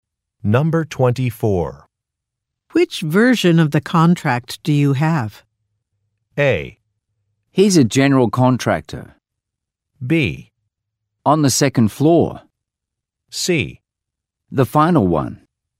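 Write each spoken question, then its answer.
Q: Which version of the contract do you have?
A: C: The final one.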